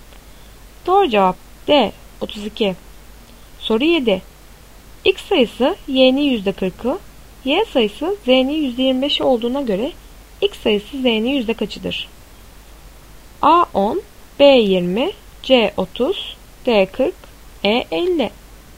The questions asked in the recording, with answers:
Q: X sayısı Y'nin %40'ı, Y sayısı Z'nin %25'i olduğuna göre X sayısı Z'nin yüzde kaçıdır?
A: Doğru cevap A 10.